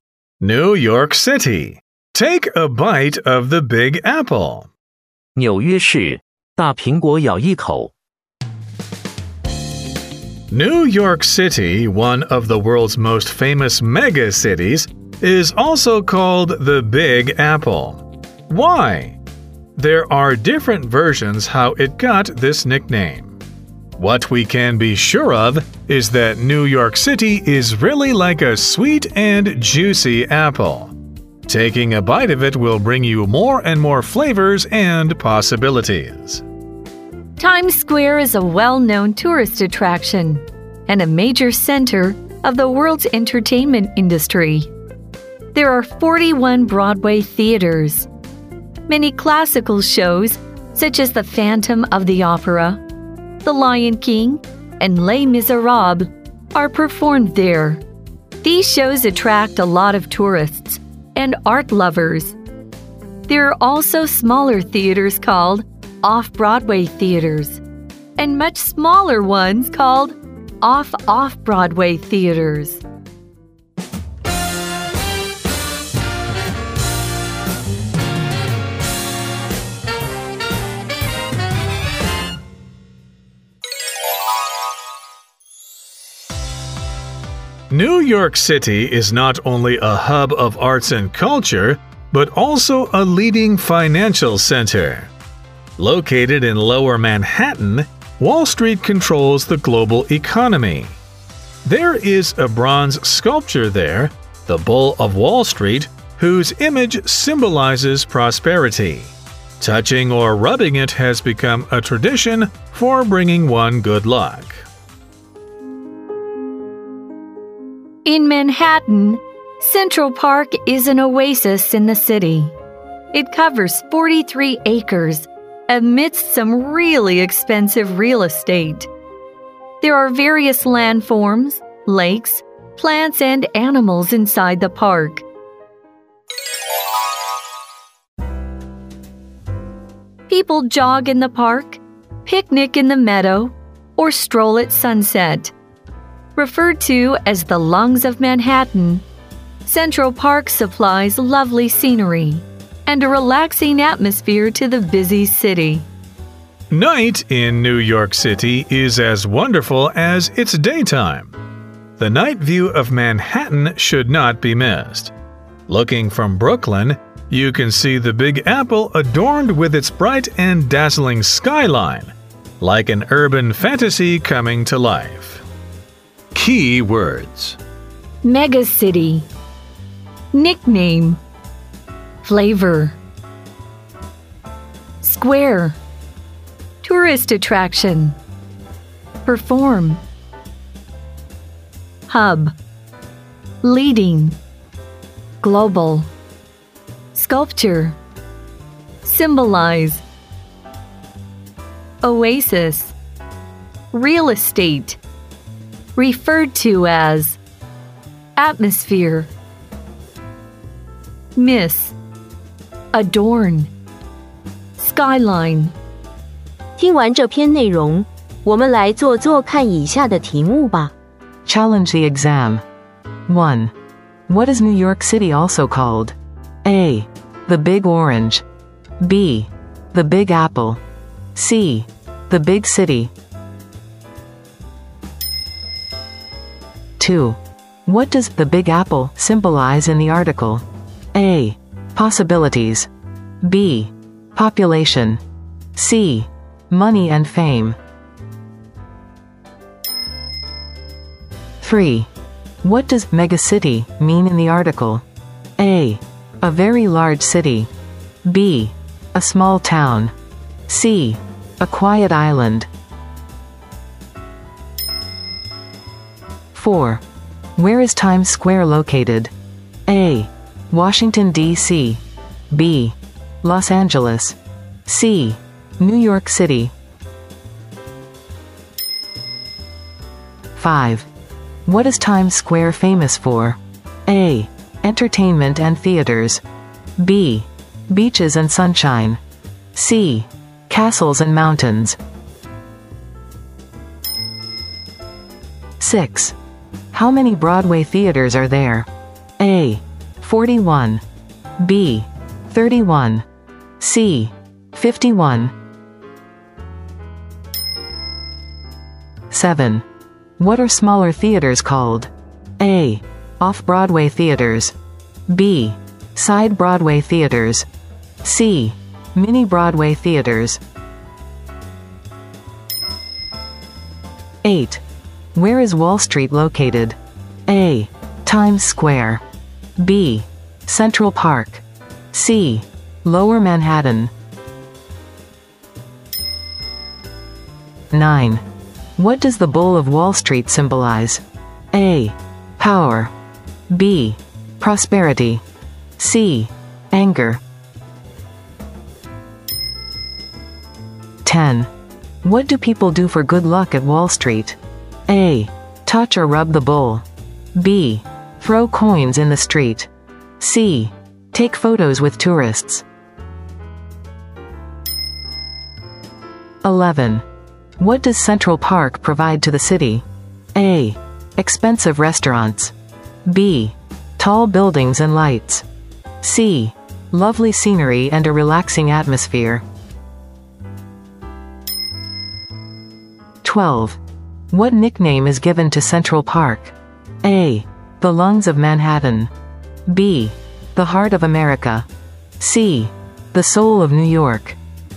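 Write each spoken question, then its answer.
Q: What is New York City also called?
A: B: The Big Apple.

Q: What does the Big Apple symbolize in the article?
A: A: Possibilities.

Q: What does megacity mean in the article?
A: A: A very large city.

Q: Where is Times Square located?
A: C: New York City.

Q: What is Times Square famous for?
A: A: Entertainment and theaters.

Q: How many Broadway theaters are there?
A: A: 41.

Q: What are smaller theaters called?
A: A: Off-Broadway theaters.

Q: Where is Wall Street located?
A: C: Lower Manhattan.

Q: What does the Bull of Wall Street symbolize?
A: B: Prosperity.

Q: What do people do for good luck at Wall Street?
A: A: Touch or rub the bull.

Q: What does Central Park provide to the city?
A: C: Lovely scenery and a relaxing atmosphere.

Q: What nickname is given to Central Park?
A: A: The Lungs of Manhattan.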